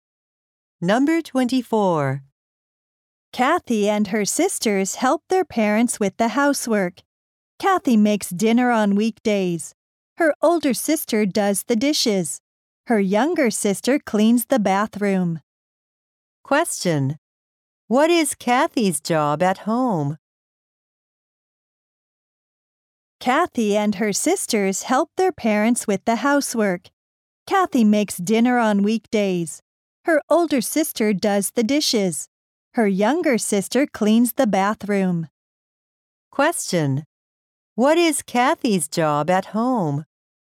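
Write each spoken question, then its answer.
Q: what is Kathy's job at home?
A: Making dinner on weekdays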